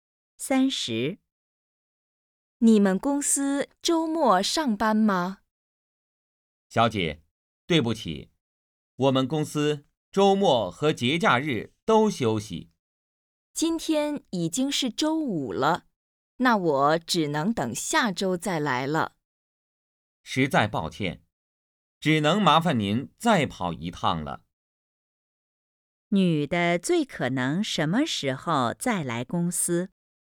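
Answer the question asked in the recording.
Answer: 下周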